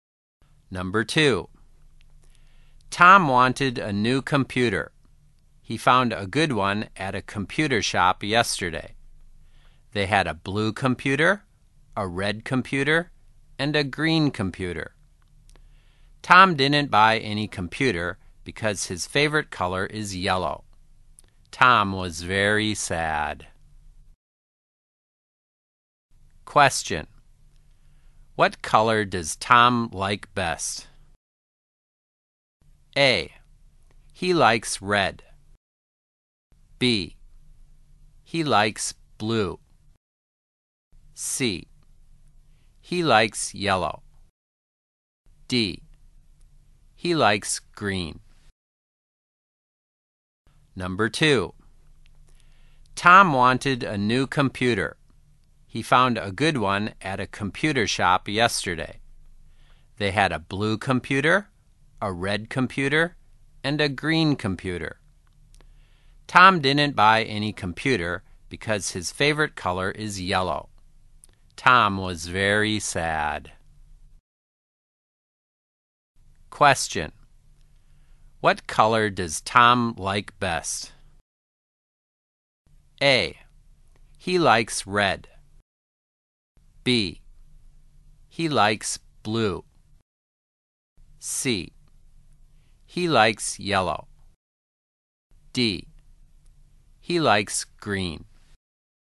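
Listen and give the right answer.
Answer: C: He likes yellow.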